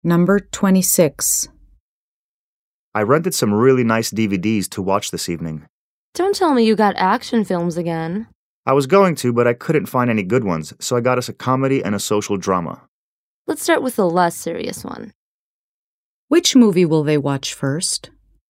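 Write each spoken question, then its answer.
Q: Which movie will they watch first?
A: The comedy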